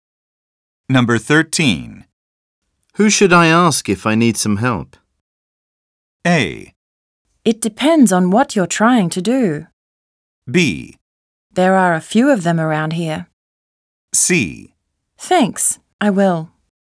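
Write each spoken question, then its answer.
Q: Who should I ask if I need some help?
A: A: It depends on what you're trying to do.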